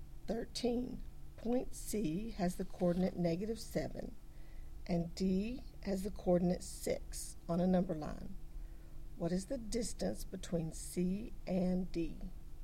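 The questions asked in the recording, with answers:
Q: What is the distance between C and D?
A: 13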